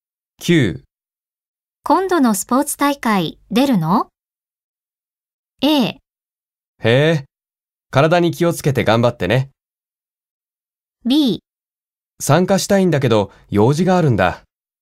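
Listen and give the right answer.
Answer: B: 参加したいんだけど用事があるんだ。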